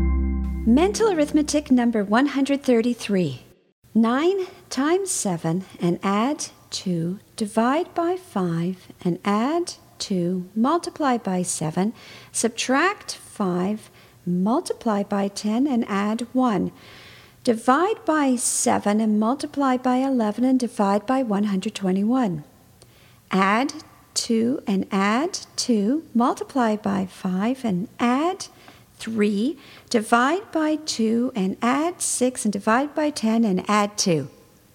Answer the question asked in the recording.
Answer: And the answer is 7.